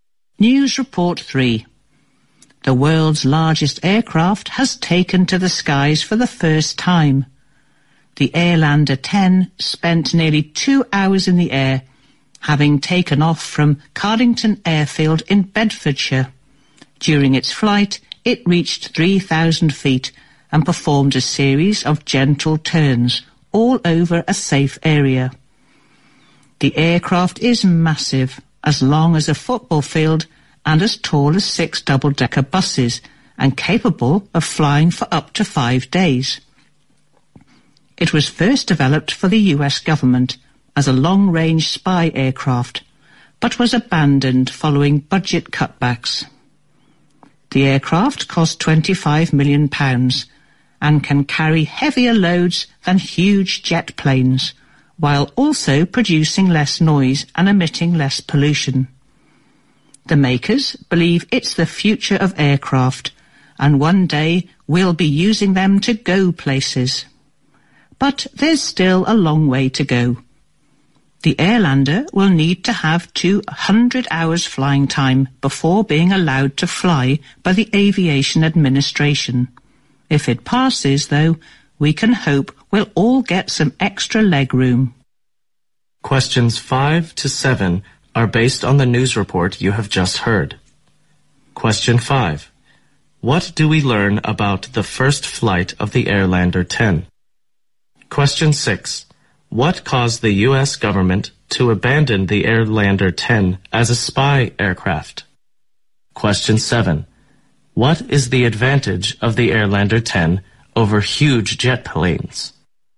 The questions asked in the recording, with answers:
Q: What caused the U.S. government to abandon the Airlander 10 as a spy aircraft?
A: This is caused by budget cutbacks.

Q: What is the advantage of the Airlander 10 over huge jet planes?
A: Airlander 10 can carry heavier loads, 它可以携带更重的载重